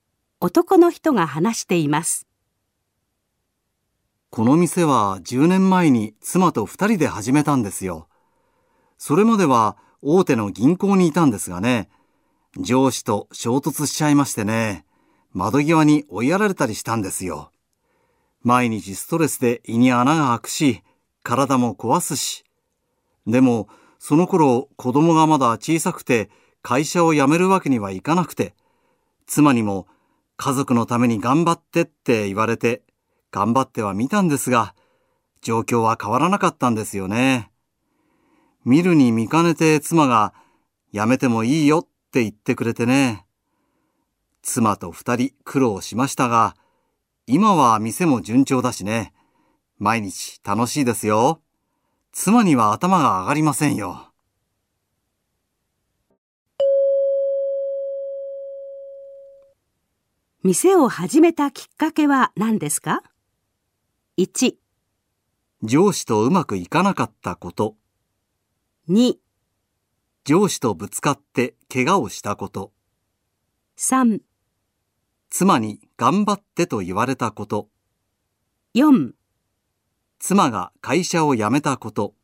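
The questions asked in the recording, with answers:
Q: 店を始めたきっかけは何ですか?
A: 1: 上司とうまくいかなかったこと。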